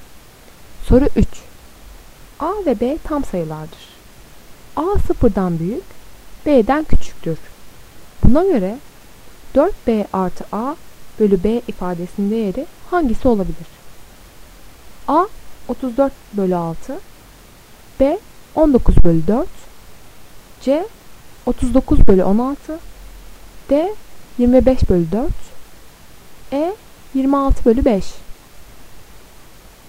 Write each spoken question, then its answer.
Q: Buna göre 4B artı A bölü B ifadesinin değeri hangisi olabilir?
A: Doğru cevap B 19 bölü 4.